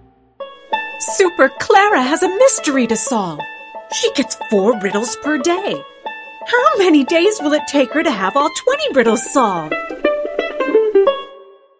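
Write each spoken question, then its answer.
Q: How many days will it take her to have all 20 riddles solved?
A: 5 days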